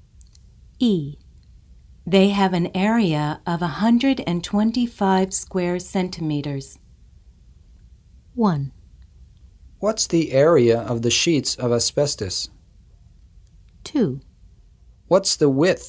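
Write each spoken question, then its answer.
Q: They have an area of 125 square centimeters.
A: 1: What's the area of the sheets of asbestos?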